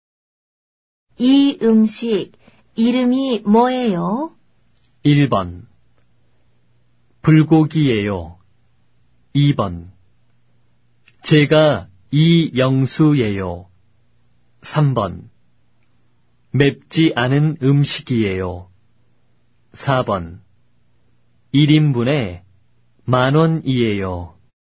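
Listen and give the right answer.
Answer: 1: 불고기예요.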